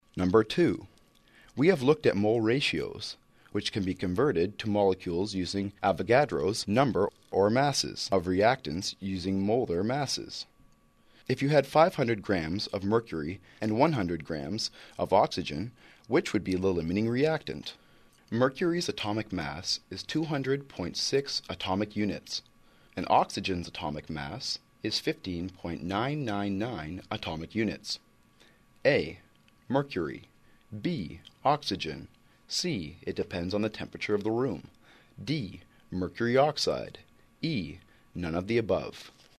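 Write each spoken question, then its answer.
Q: If you had 500 grams of mercury and 100 grams of oxygen, which would be the limiting reactant?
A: A: Mercury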